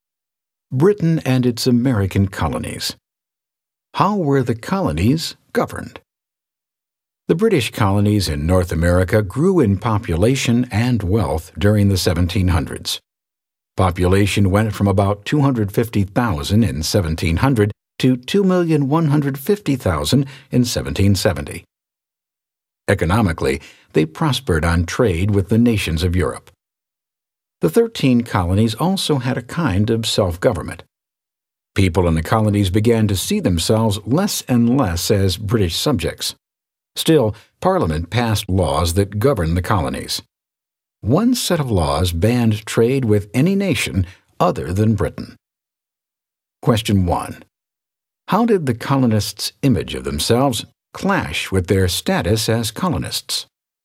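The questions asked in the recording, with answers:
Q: How did the colonists' image of themselves clash with their status as colonists?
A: They saw themselves less and less as British subjects, yet Parliament still passed laws governing them, such as banning trade with nations other than Britain.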